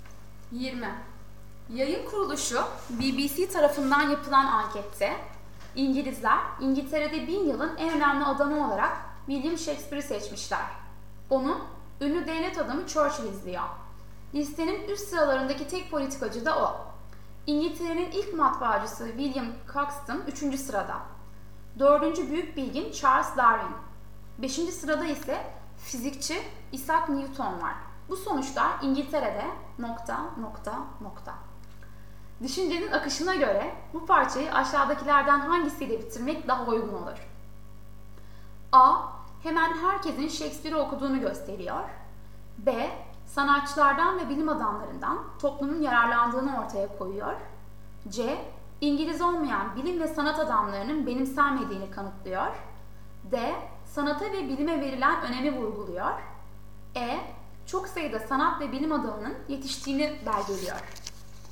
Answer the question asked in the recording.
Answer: Doğru yanıt D.